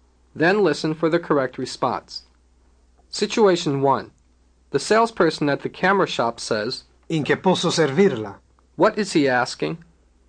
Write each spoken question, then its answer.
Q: What is he asking?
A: What can I do for you?